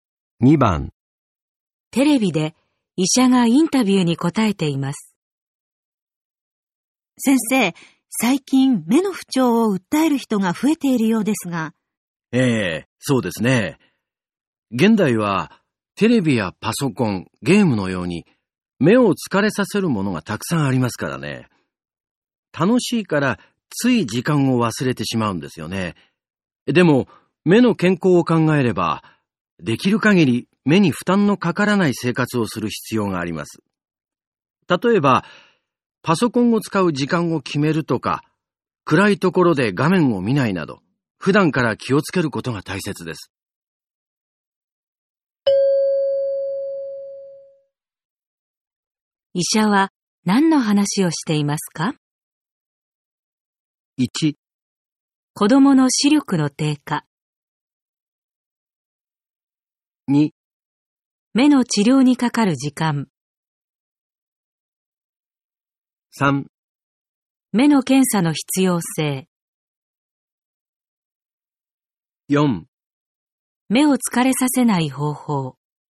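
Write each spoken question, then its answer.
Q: 医者は何の話をしていますか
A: 4: 目を疲れさせない方法。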